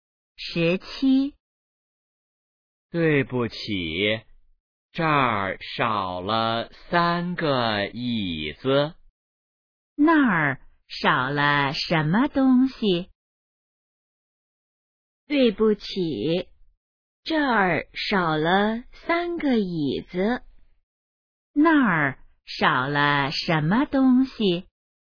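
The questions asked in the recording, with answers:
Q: 那儿少了什么东西?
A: 三个椅子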